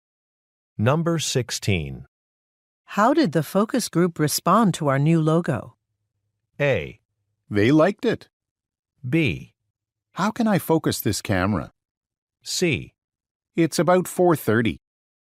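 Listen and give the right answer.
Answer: A: They liked it.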